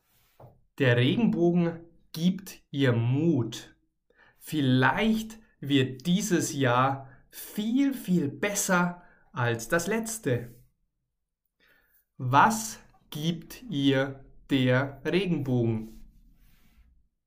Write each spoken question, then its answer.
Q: Was gibt ihr der Regenbogen?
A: Mut. Der Regenbogen gibt ihr Mut.